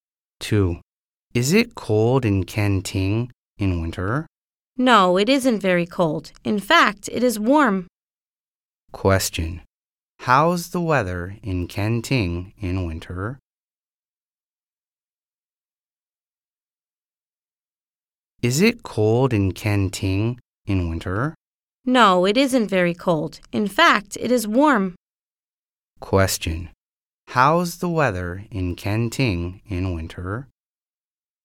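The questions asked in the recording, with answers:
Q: How's the weather in Kenting in winter?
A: It is warm.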